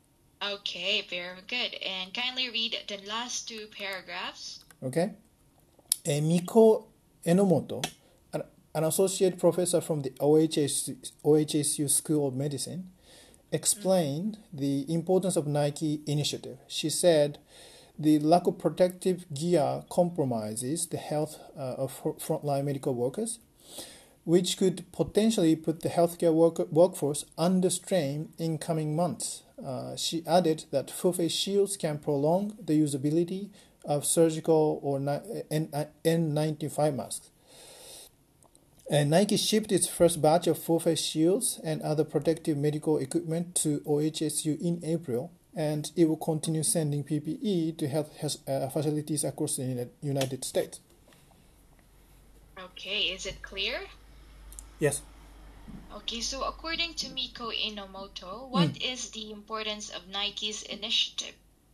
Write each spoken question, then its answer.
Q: the importance of Nike's initiative?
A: Um, so the lack of protective gear, gear compromises the health uh, of frontline medical workers, uh, which could potentially uh, put the healthcare workforce under strain in